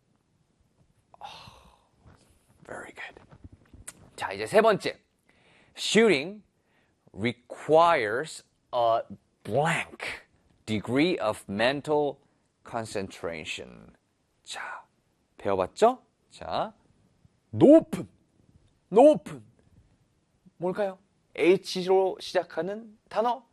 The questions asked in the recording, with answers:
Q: Shooting requires a blank degree of mental concentration.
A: High.